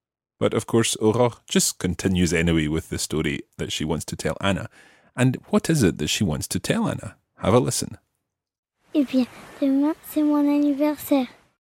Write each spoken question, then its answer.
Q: And what is it that she wants to tell Anna?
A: Tomorrow, it's my birthday.